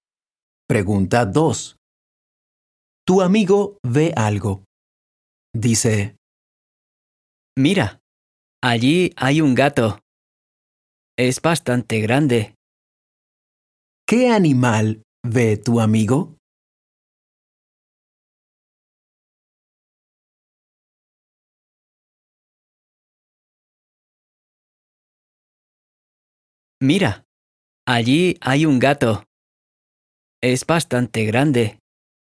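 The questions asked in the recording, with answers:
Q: ¿Qué animal ve tu amigo?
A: Un gato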